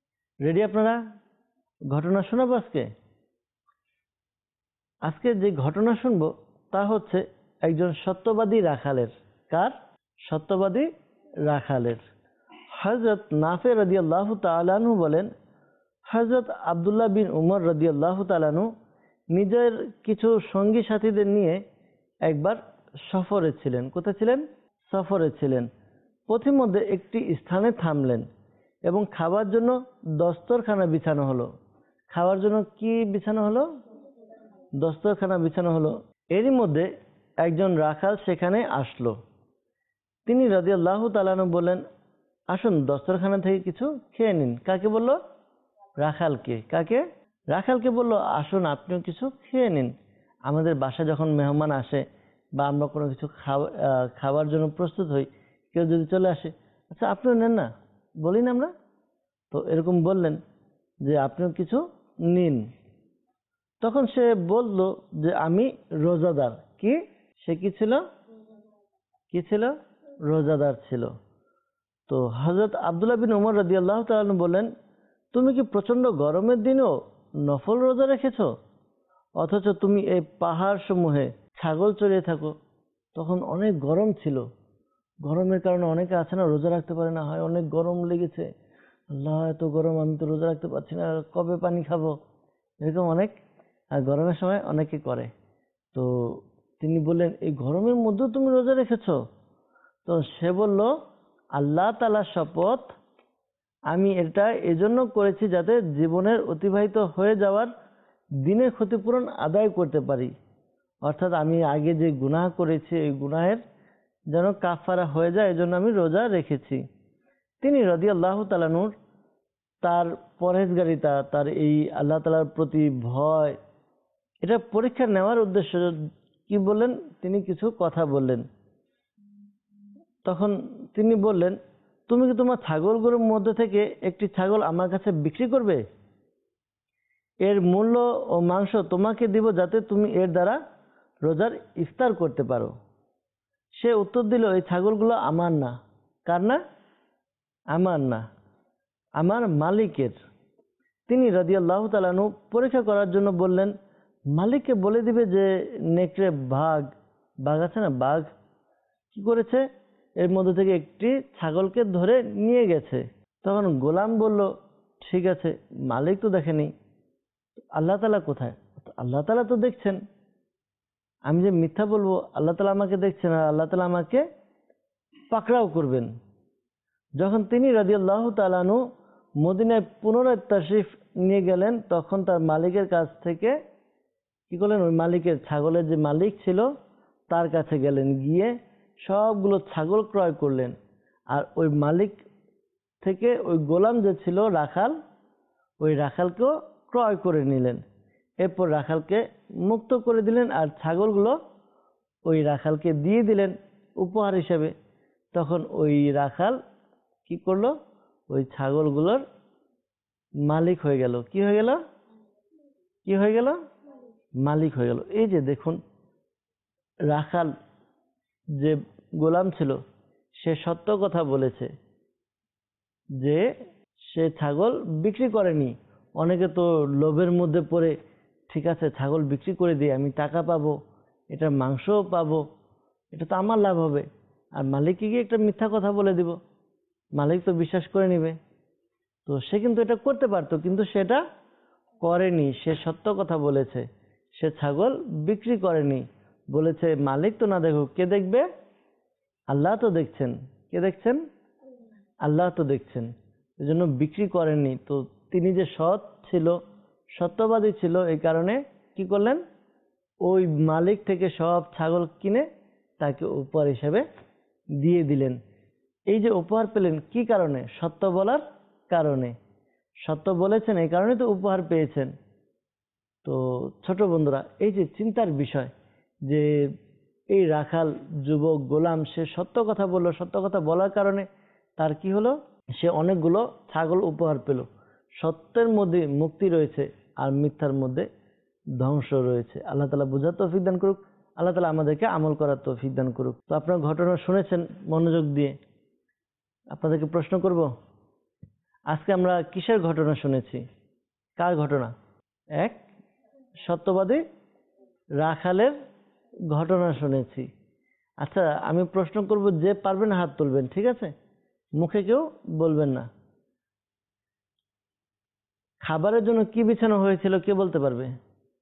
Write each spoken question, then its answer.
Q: খাবারের জন্য কি বিছানো হয়েছিল কে বলতে পারবে?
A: দস্তরখানা বিছানো হয়েছিল